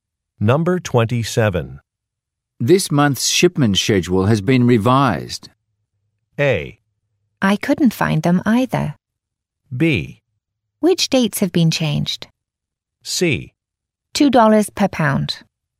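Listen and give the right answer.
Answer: B: Which dates have been changed?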